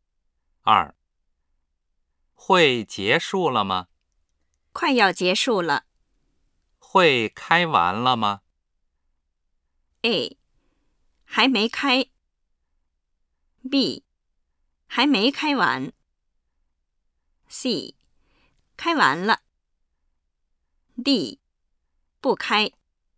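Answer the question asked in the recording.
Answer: B: 还没开完。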